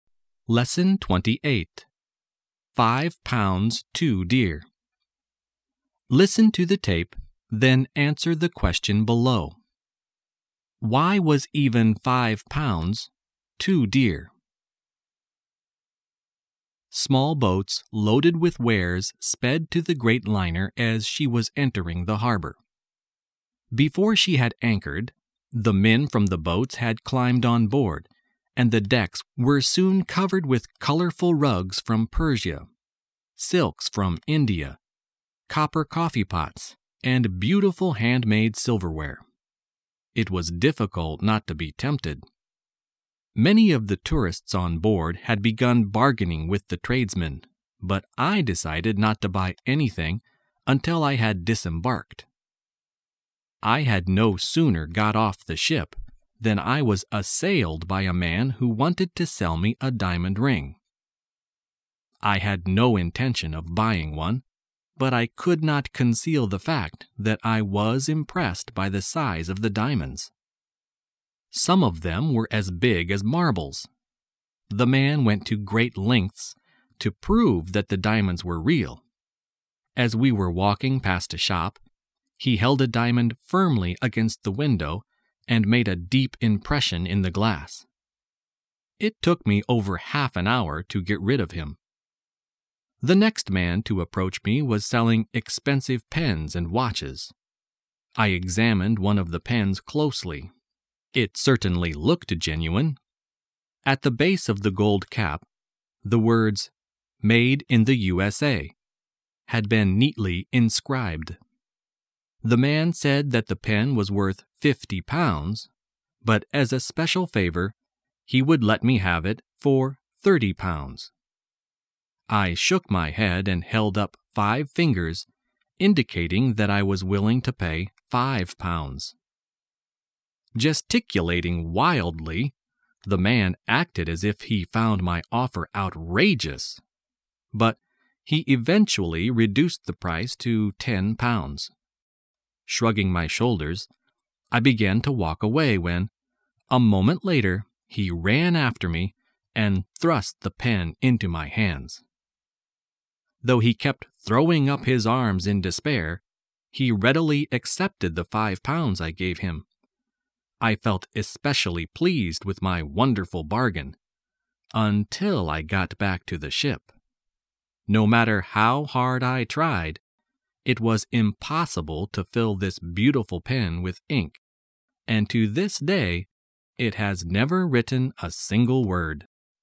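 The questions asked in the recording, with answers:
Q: Why was even 5 pounds, 2 deer?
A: Because the pen was useless: it could never be filled with ink and never wrote a word.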